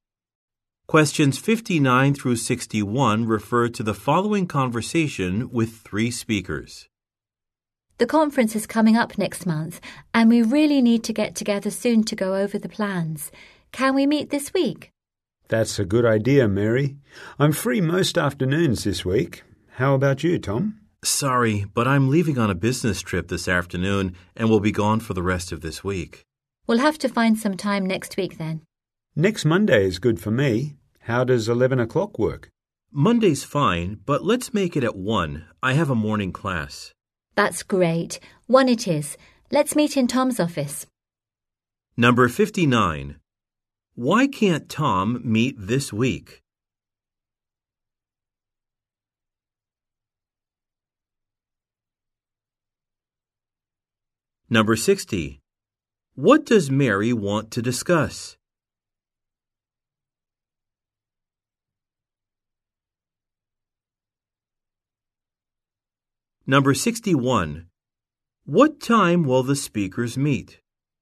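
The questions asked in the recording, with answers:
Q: Why can't Tom meet this week?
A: He is going on a business trip

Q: What does Mary want to discuss?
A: Plans for the conference

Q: What time will the speakers meet?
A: 1 o'clock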